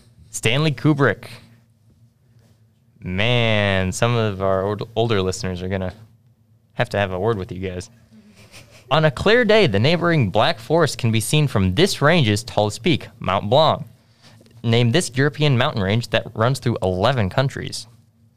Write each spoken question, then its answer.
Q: Name this European mountain range that runs through 11 countries.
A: The Alps.